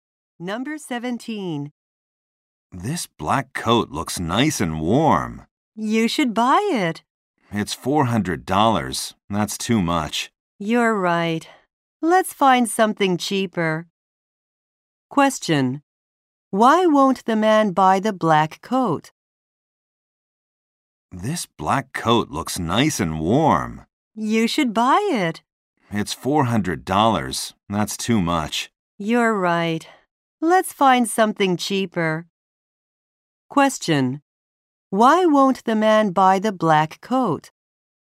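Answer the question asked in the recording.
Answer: It is too expensive.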